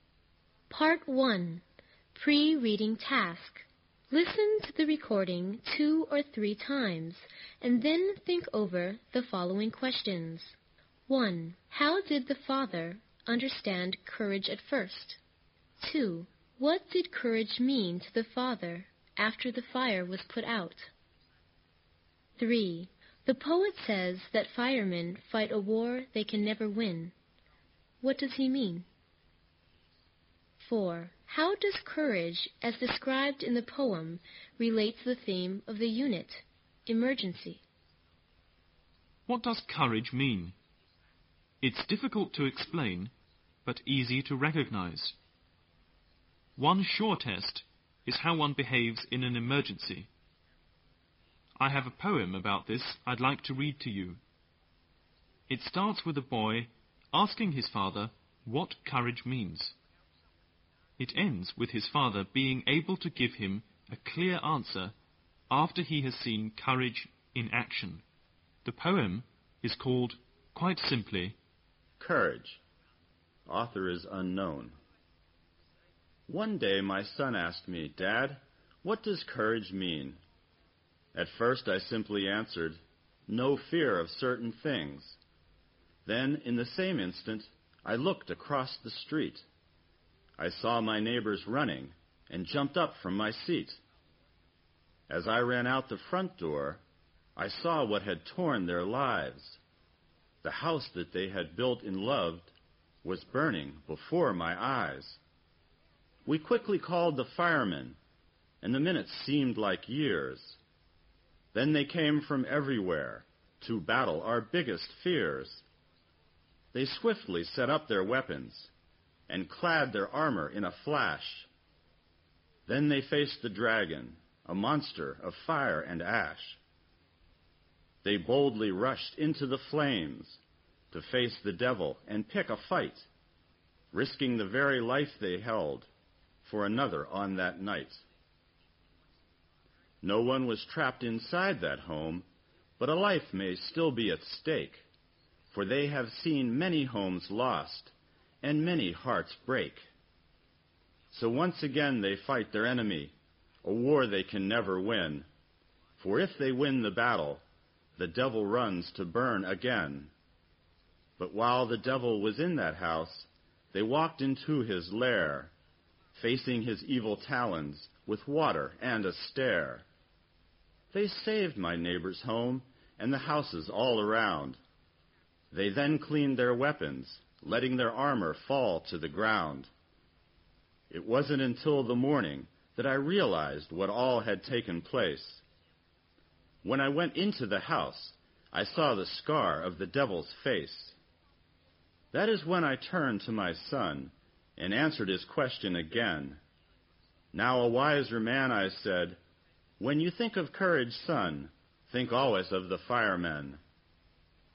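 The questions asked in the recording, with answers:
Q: How did the father understand courage at first?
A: As having no fear of certain things

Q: What did courage mean to the father after the fire was put out?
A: Courage meant the firemen, who risk their lives to save others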